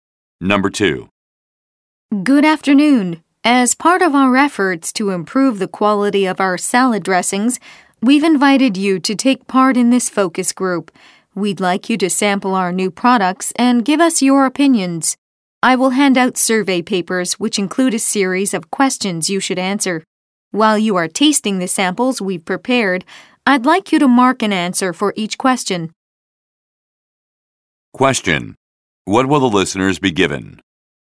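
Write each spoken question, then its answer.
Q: What will the listeners be given?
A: Survey papers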